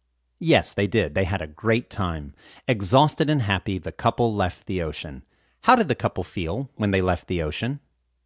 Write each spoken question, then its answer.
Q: How did the couple feel when they left the ocean?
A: The couple felt exhausted and happy when they left the ocean.